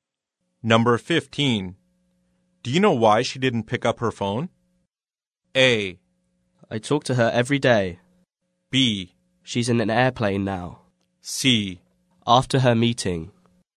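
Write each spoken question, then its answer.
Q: Do you know why she didn't pick up her phone?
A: B: She's in an airplane now.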